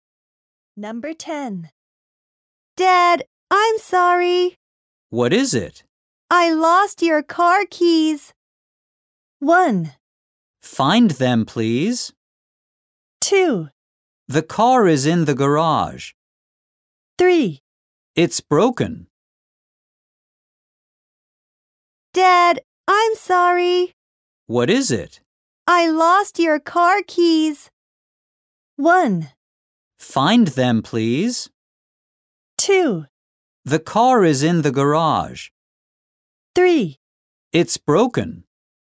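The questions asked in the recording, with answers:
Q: I lost your car keys.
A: 1: Find them, please.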